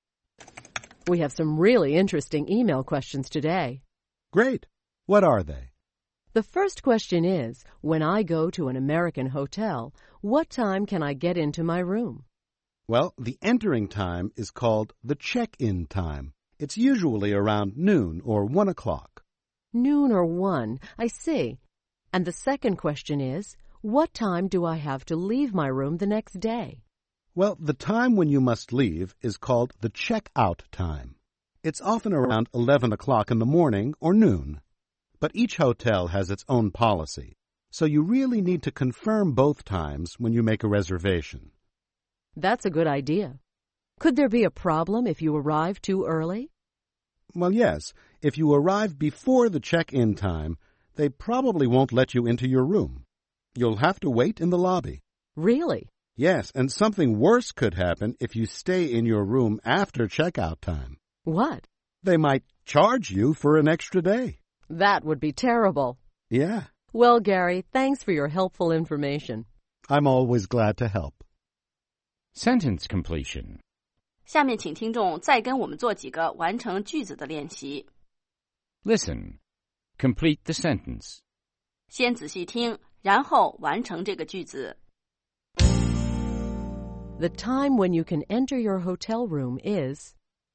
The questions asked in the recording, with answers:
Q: The time when you can enter your hotel room is...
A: The check-in time. The entering time is called the check-in time.